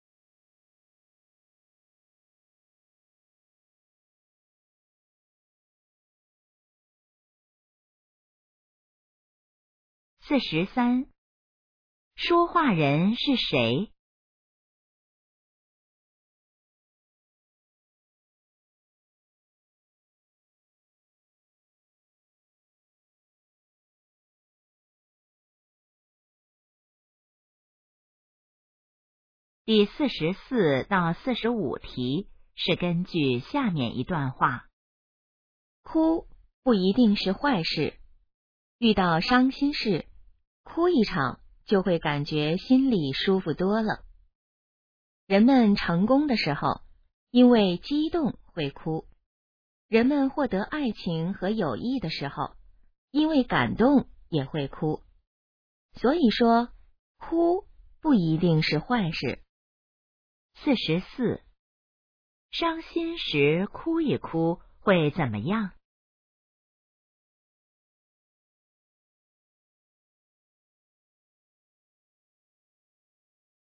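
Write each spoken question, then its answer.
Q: 伤心时哭一哭会怎么样?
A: 心里会舒服多了

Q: 这段话主要想告诉我们什么?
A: 哭不一定是坏事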